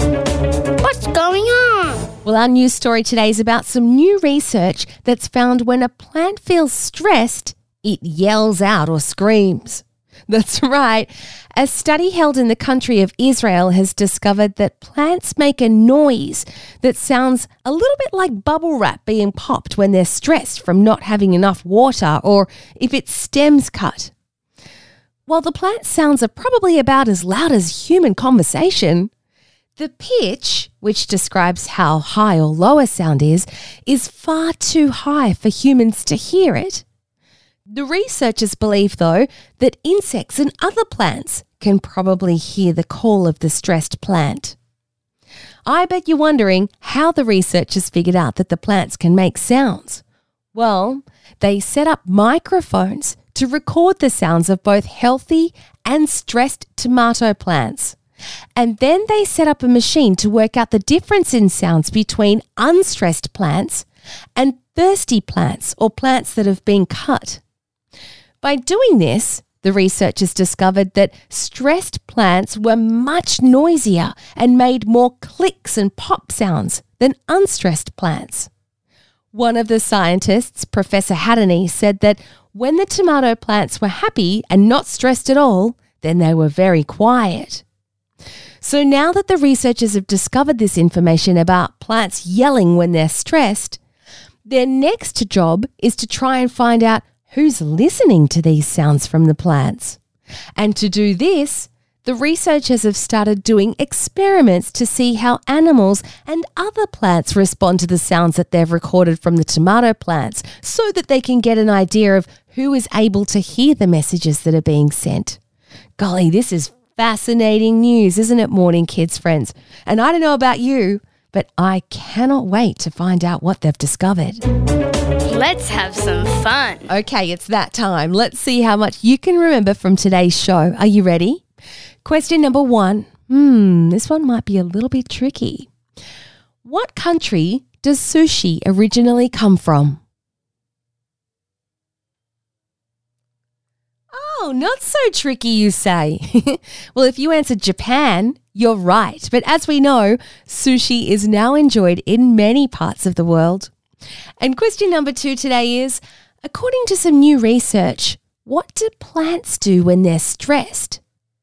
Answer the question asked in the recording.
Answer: They yell, they scream, or they make a clicking and popping sound.